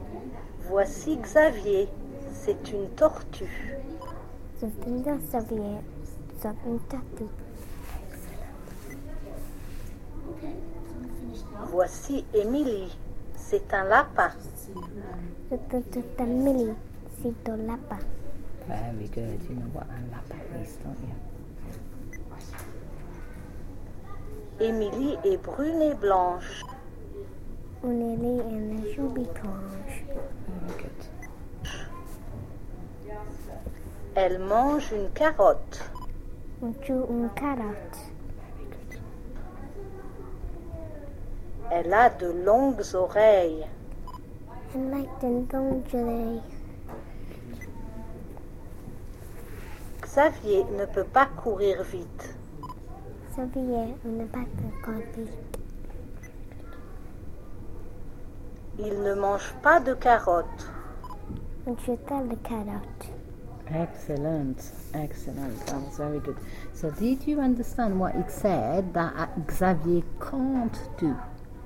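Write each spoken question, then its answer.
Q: So did you understand what it said that Xavier can't do?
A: He can't run fast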